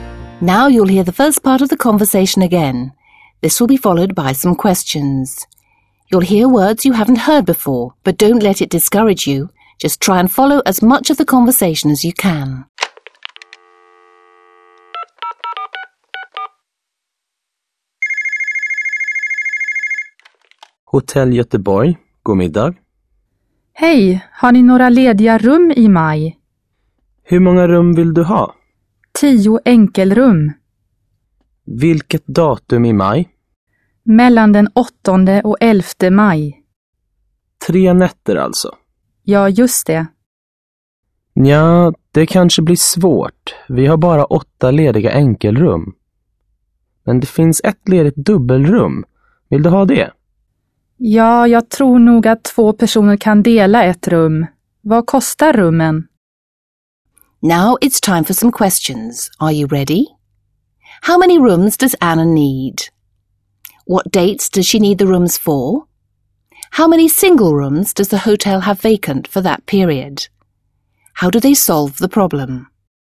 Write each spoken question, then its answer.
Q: How many rooms does Anna need?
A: Anna would like to book 10 single rooms.

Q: What dates does she need the rooms for?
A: Anna needs the rooms from the 8th to the 11th of May.